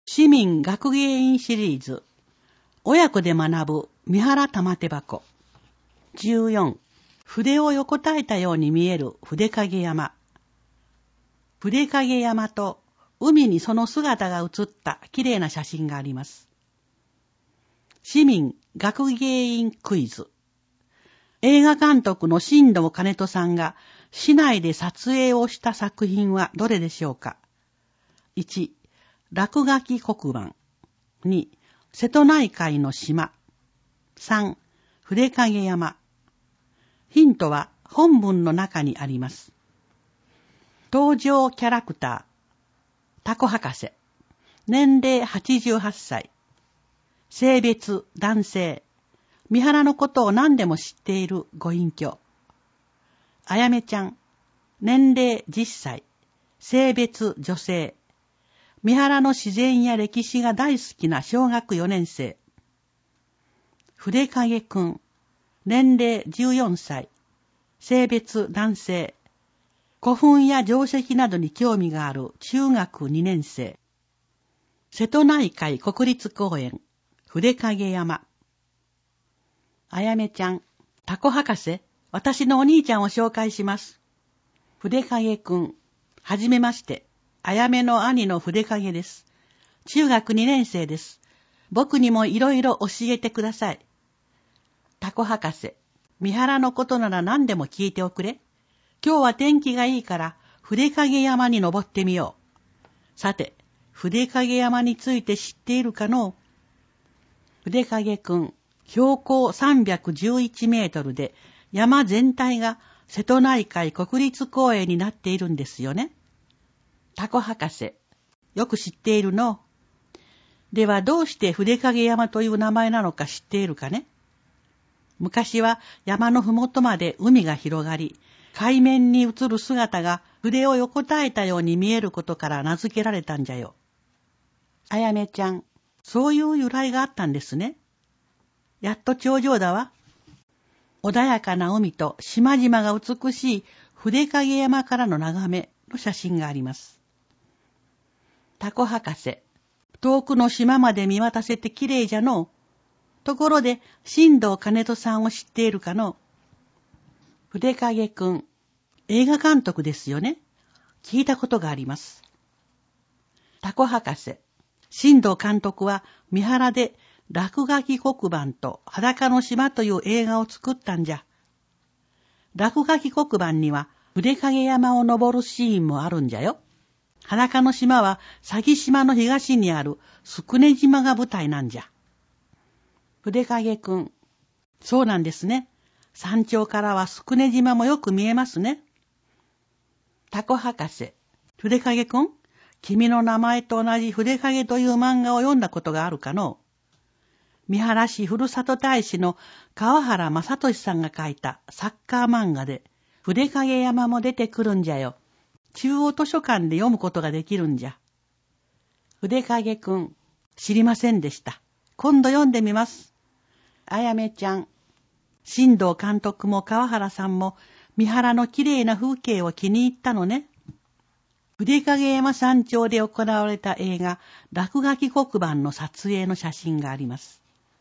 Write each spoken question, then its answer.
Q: 映画監督の新藤兼人さんが市内で撮影をした作品はどれでしょうか。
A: 1の落書き黒板